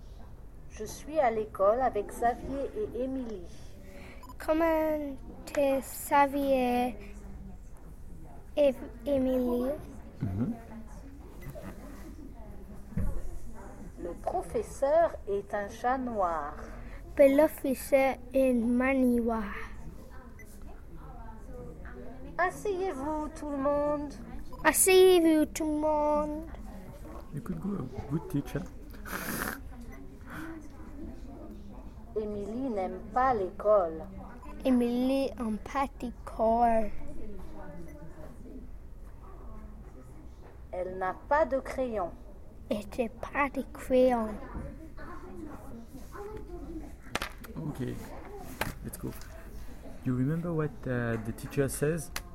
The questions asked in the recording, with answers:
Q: You remember what the teacher says?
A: Asseyez-vous.